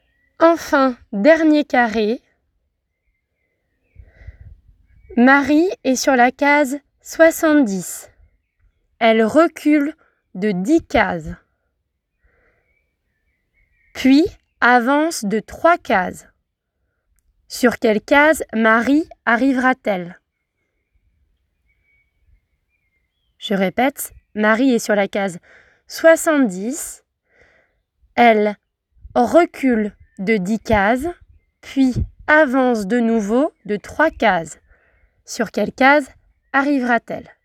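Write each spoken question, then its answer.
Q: Sur quelle case Marie arrivera-t-elle?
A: 63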